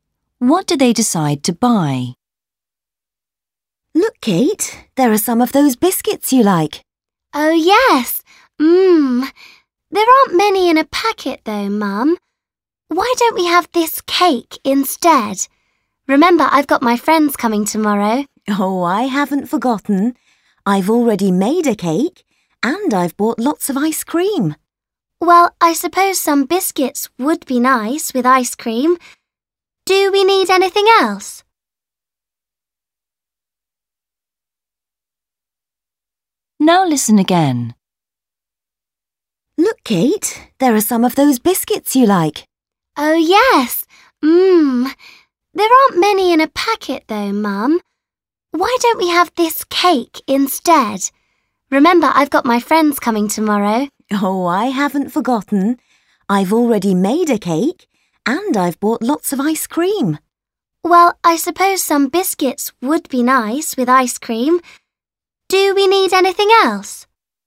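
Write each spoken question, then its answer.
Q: What do they decide to buy?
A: biscuits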